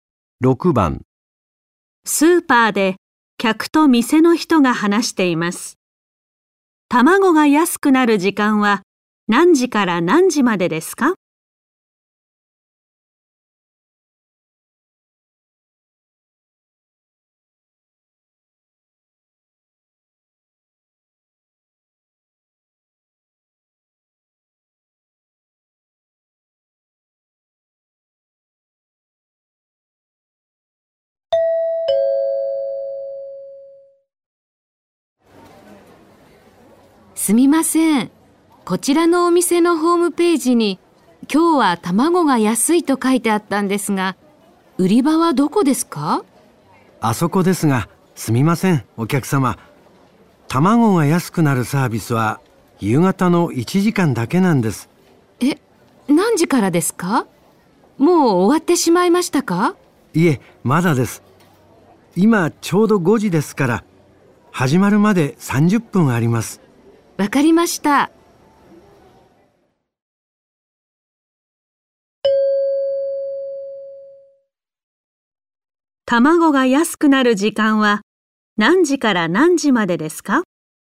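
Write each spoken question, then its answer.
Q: 卵が安くなる時間は何時から何時までですか?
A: 5時半から6時半まで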